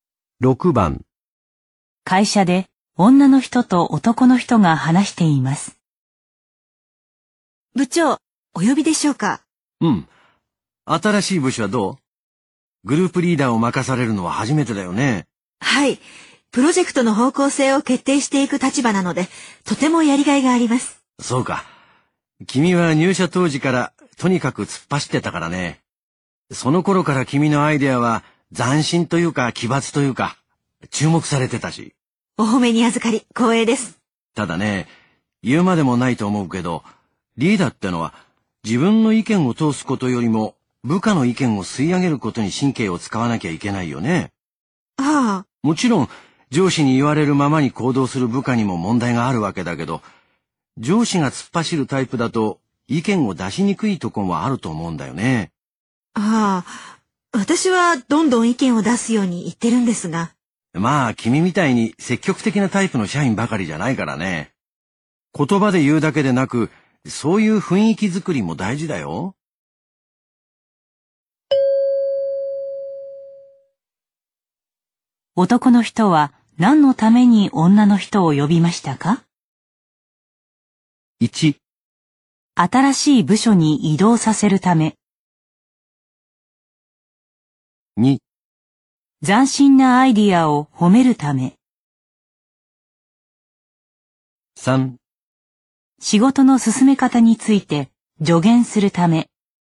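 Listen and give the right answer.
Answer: 3: 仕事の進め方について助言するため。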